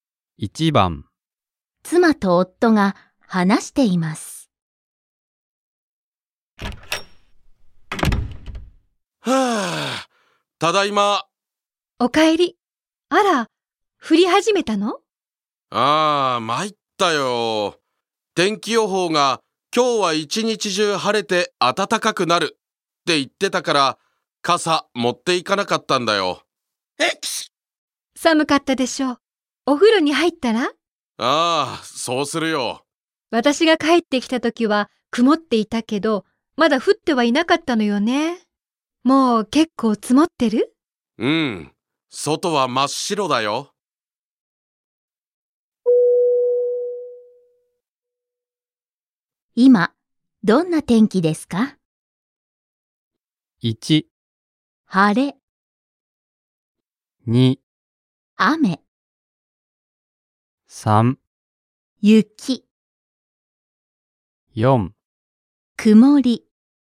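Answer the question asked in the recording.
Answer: 3: 雪。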